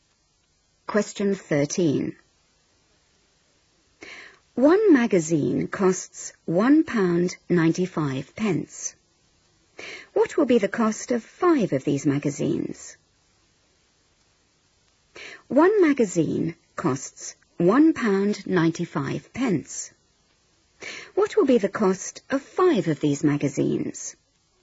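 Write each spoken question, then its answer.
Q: What will be the cost of 5 of these magazines?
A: £9.75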